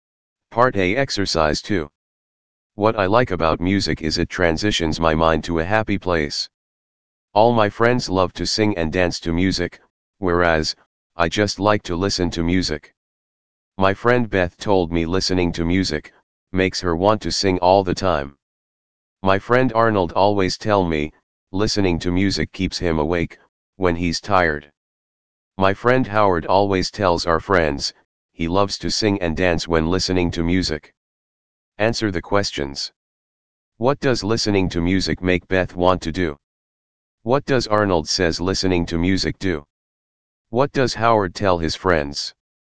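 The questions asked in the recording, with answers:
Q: What does listening to music make Beth want to do?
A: Sing all the time

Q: What does Arnold says listening to music do?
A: Keeps him awake when he's tired

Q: What does Howard tell his friends?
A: He loves to sing and dance when listening to music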